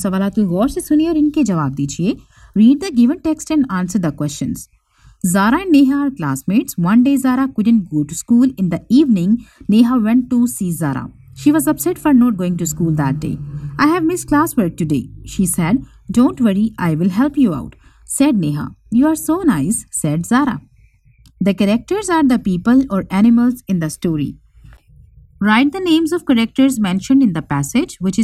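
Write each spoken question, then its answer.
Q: Write the names of characters mentioned in the passage.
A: Zara and Neha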